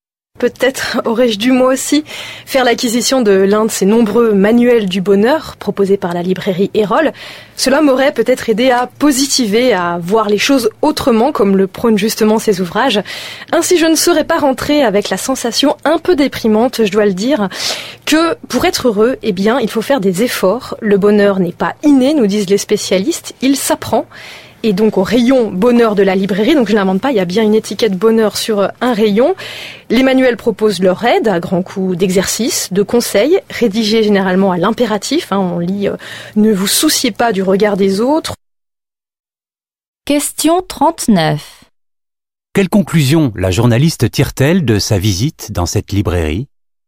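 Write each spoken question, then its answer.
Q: Quelle conclusion la journaliste tire-t-elle de sa visite dans cette librairie ?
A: Que pour être heureux, il faut faire des efforts : le bonheur n'est pas inné, il s'apprend.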